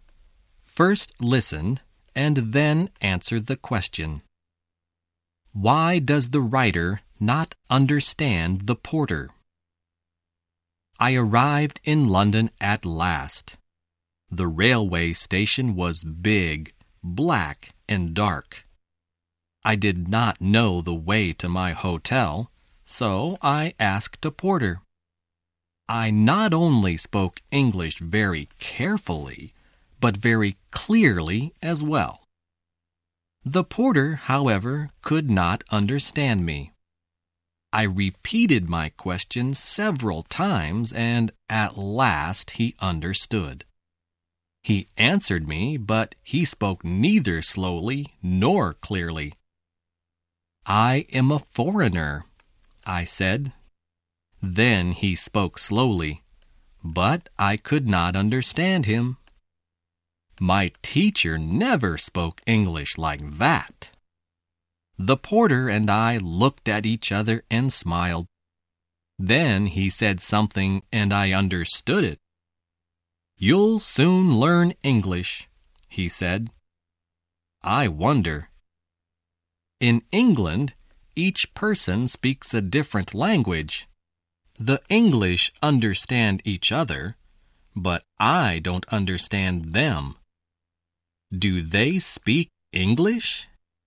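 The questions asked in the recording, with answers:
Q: Why does the writer not understand the porter?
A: Because the porter spoke neither slowly nor clearly, and even when he spoke slowly his English was not like the English the writer's teacher spoke.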